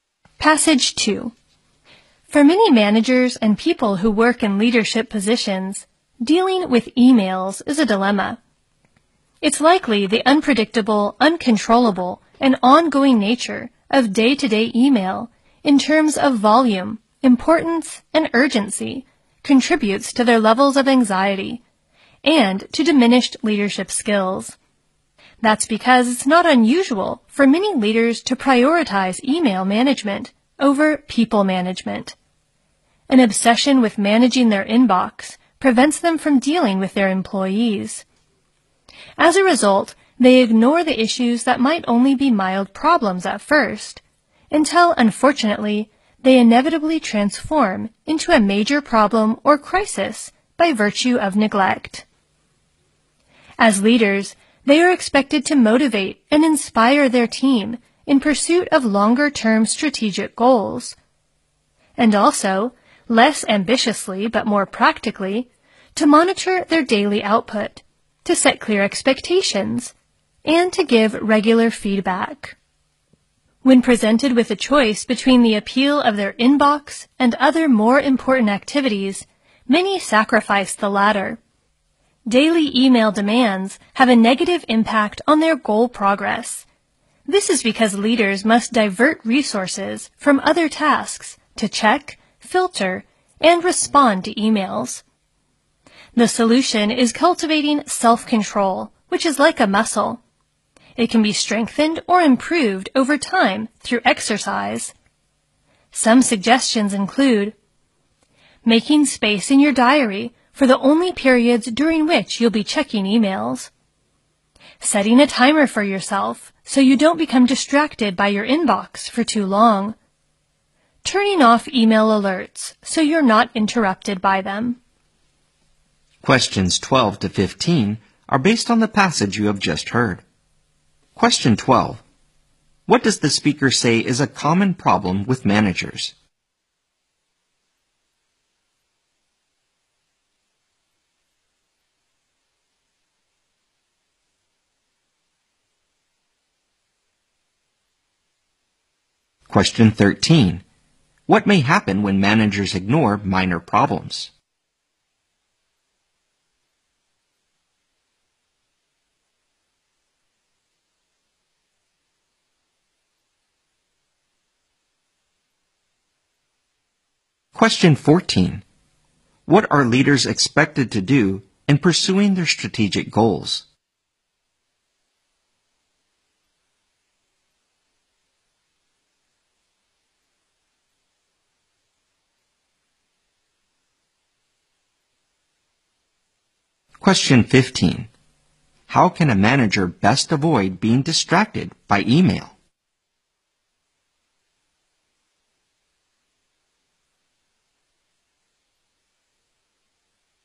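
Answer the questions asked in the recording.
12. They put managing email ahead of managing people.
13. The problems turn into major problems or crises.
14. Motivate and inspire their team.
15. By building self-control, for example by setting times for checking email, using a timer and turning off alerts.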